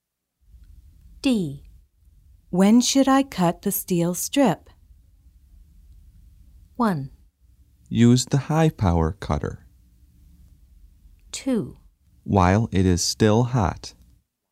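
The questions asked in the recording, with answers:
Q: When should I cut the steel strip?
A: 2: While it is still hot.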